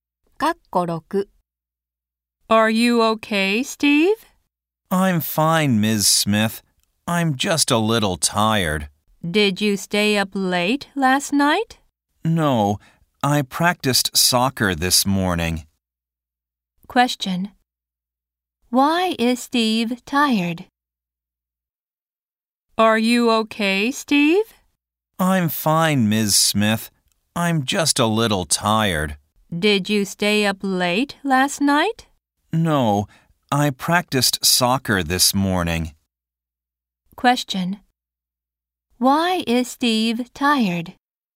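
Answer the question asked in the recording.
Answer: He practiced soccer this morning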